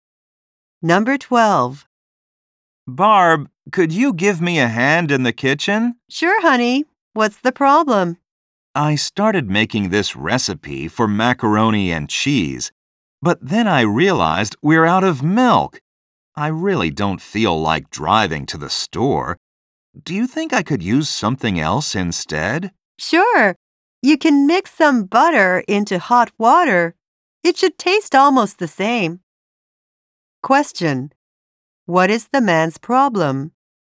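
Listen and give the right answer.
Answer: They are out of milk for his recipe.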